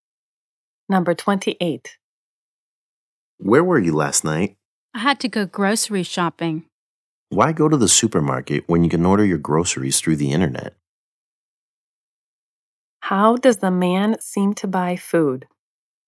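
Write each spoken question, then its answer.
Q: How does the man seem to buy food?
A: He orders groceries through the internet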